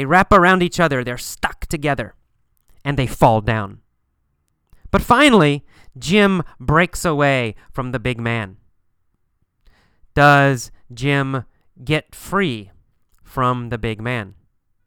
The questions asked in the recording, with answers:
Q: Does Jim get free from the big man?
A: Yeah, that's right. He gets free.